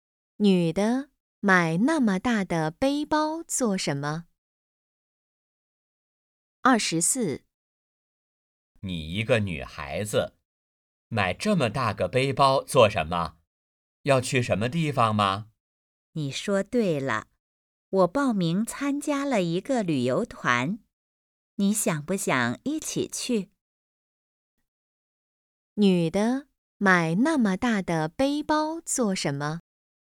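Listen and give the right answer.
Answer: 去旅游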